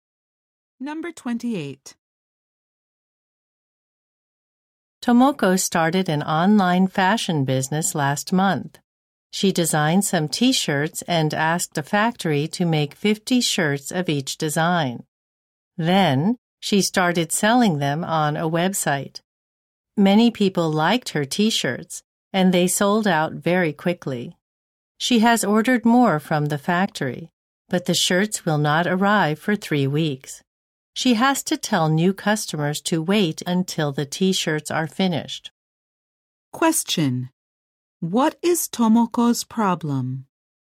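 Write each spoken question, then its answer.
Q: What is Tomoko's problem?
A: Her shirts sold out and new ones won't arrive for 3 weeks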